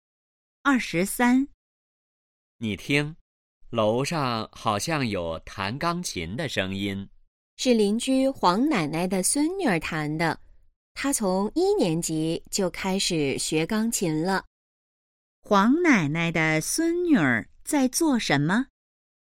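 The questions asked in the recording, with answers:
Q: 黄奶奶的孙女儿在做什么?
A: 弹钢琴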